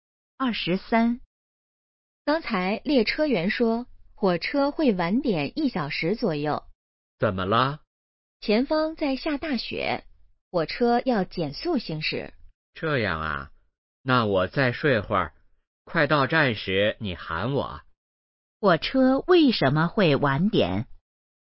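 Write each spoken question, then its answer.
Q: 火车为什么会晚点?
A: 前方下大雪,要减速行驶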